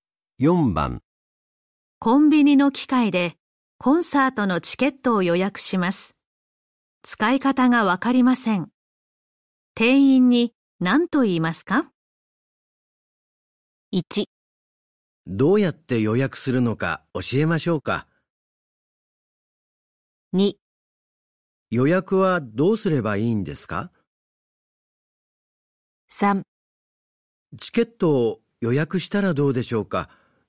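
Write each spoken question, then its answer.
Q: 使い方がわかりません。店員に何と言いますか?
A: 2: 予約はどうすればいいんですか。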